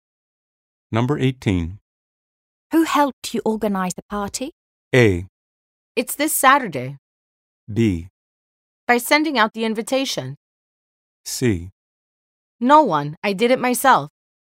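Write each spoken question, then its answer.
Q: Who helped you organize the party?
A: C: No one. I did it myself.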